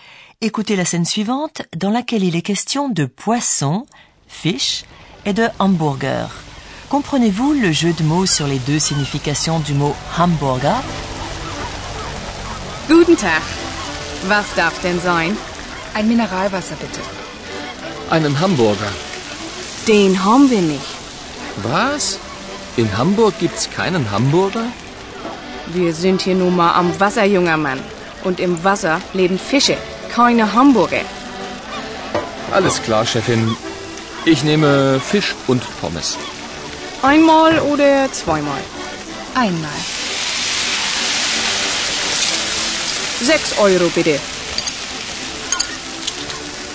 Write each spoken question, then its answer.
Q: Comprenez-vous le jeu de mots sur les deux significations du mot hamburger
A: Comme vous le savez, la scène se déroule à Hambourg et on appelle les habitants de la ville Hamburger.